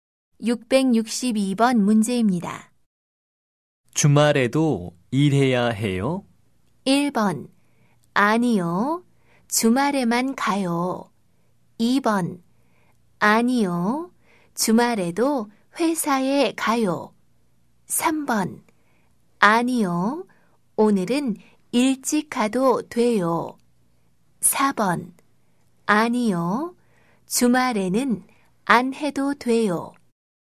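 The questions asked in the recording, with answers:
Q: 주말에도 일해야 해요?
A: 4: 아니요. 주말에는 안 해도 돼요.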